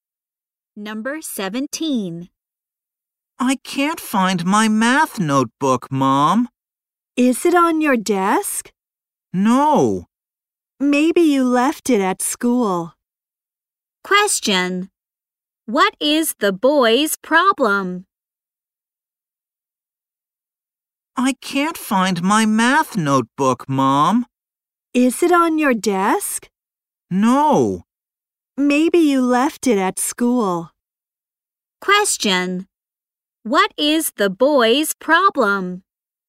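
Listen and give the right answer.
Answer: He can't find his math notebook.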